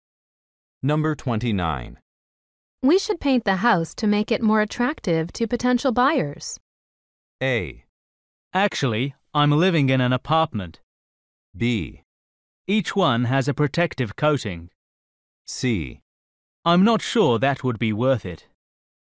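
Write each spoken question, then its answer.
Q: We should paint the house to make it more attractive to potential buyers.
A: C: I'm not sure that would be worth it.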